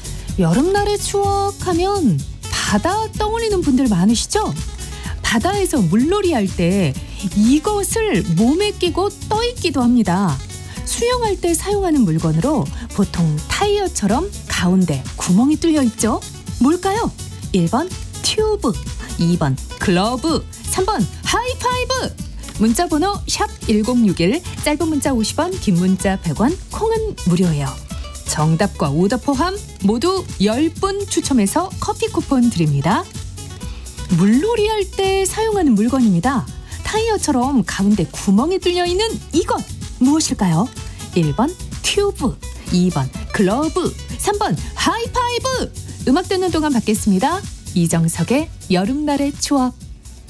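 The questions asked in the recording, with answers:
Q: 물놀이 할 때 사용하는 물건입니다. 타이어처럼 가운데 구멍이 뚫려 있는 이것 무엇일까요?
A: 1: 튜브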